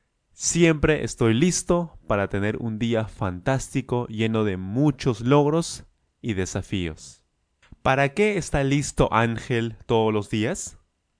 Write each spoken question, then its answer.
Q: ¿Para qué está listo Ángel todos los días?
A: Él está listo para muchos logros, para muchos éxitos, muchos resultados positivos en su día.